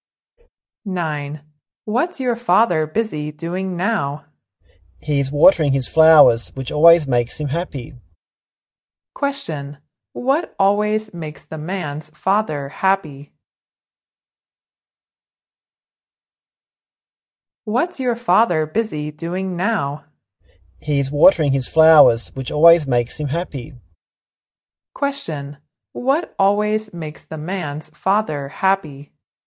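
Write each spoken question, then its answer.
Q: What always makes the man's father happy?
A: Watering his flowers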